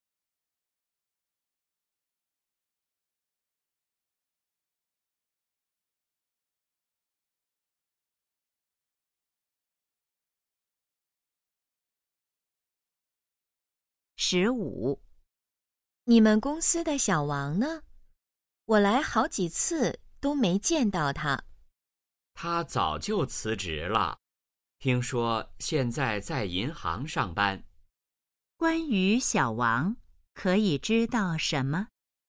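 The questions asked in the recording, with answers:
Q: 关于小王,可以知道什么?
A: 他辞职了,现在在银行上班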